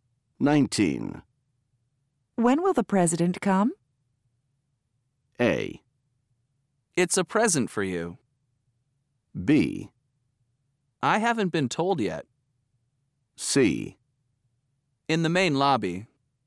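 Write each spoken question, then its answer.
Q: When will the president come?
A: B: I haven't been told yet.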